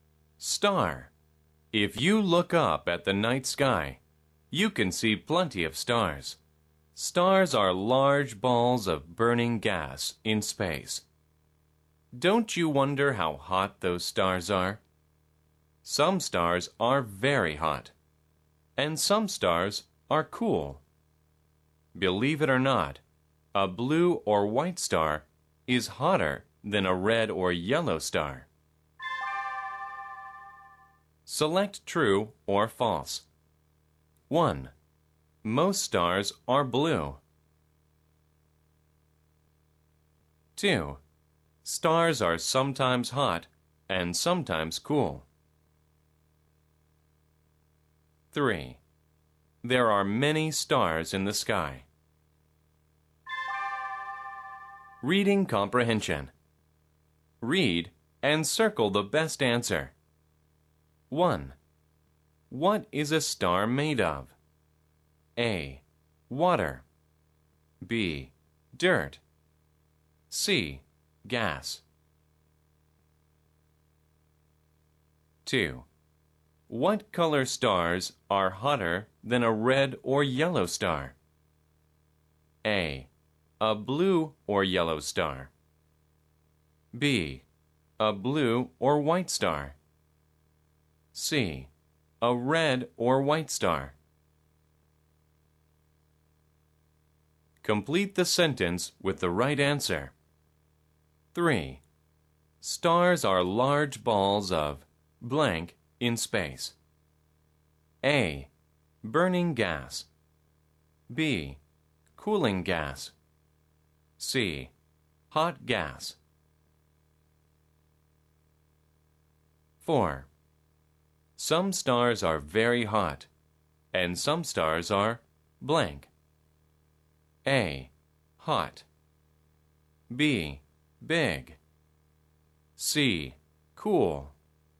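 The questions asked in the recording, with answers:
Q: Most stars are blue.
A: False

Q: There are many stars in the sky.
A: True

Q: What is a star made of?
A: C: Gas.

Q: What color stars are hotter than a red or yellow star?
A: B: A blue or white star.

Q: Stars are large balls of blank in space.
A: A: Burning gas.

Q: Some stars are very hot, and some stars are blank.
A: C: Cool.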